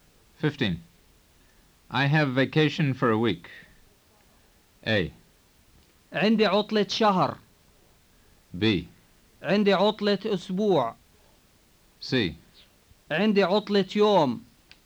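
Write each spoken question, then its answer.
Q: I have vacation for a week.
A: B: عندي عطلة أسبوع.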